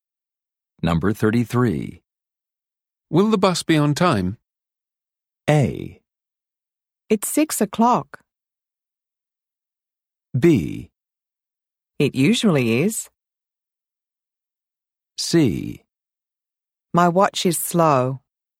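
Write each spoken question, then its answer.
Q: Will the bus be on time?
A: B: It usually is.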